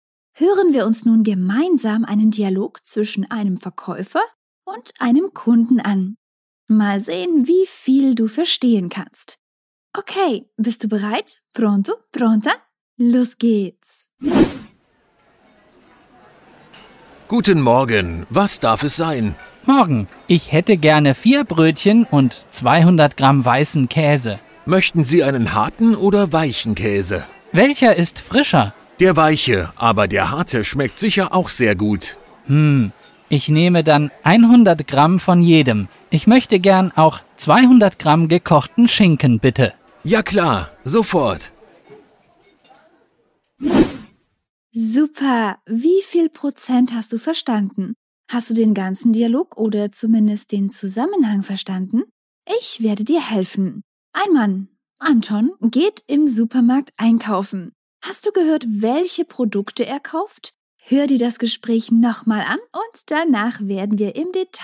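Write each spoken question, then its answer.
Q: Hast du gehört, welche Produkte er kauft?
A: 4 Brötchen, 200 Gramm weißen Käse (100 g harten und 100 g weichen) und 200 Gramm gekochten Schinken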